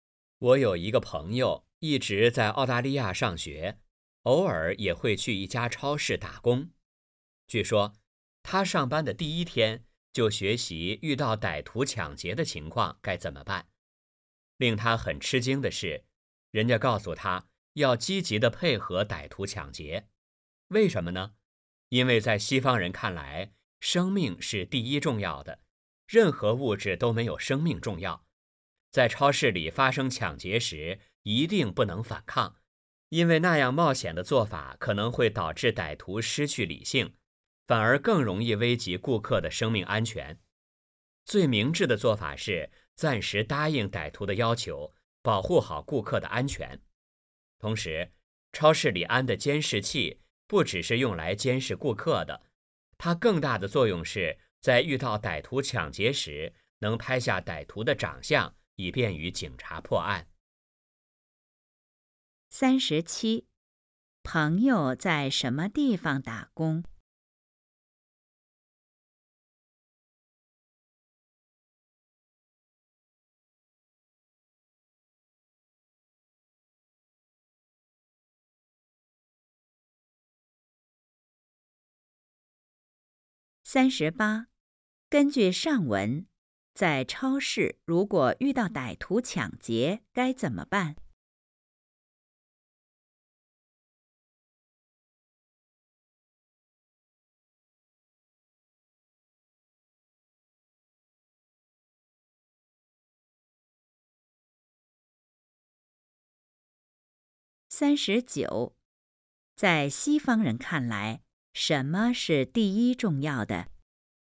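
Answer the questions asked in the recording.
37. 澳大利亚的一家超市
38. 积极配合歹徒,不反抗,保护顾客安全
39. 生命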